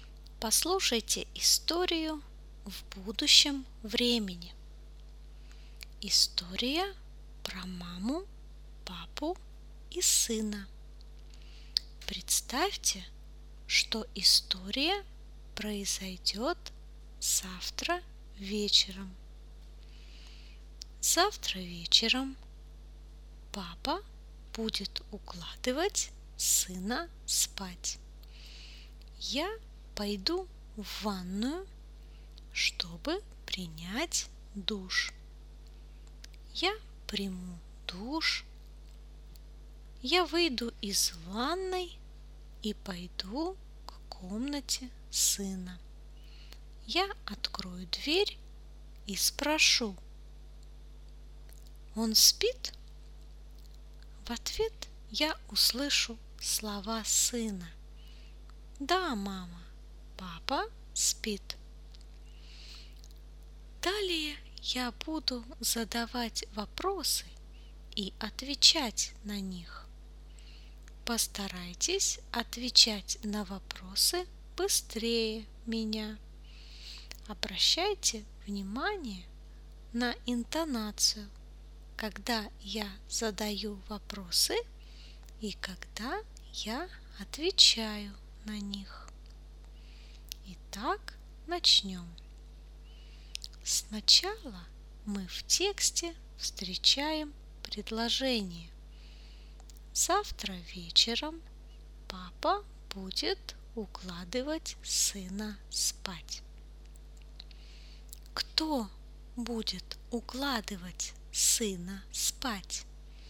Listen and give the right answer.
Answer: Папа. Папа будет укладывать сына спать.